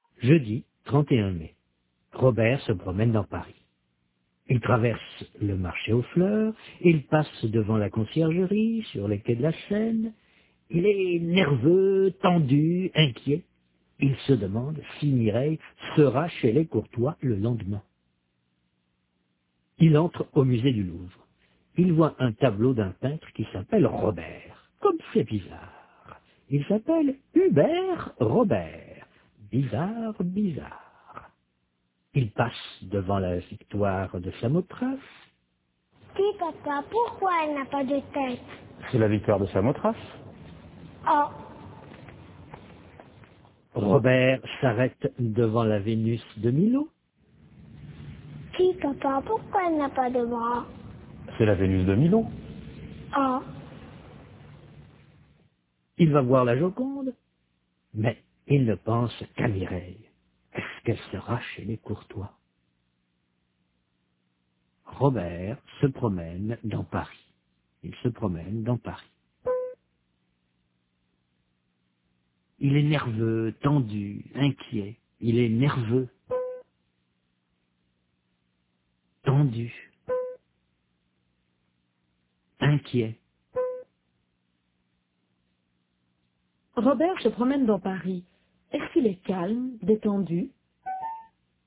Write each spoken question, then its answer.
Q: Est-ce qu'il est calme, détendu?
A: Non, il est nerveux, tendu, inquiet.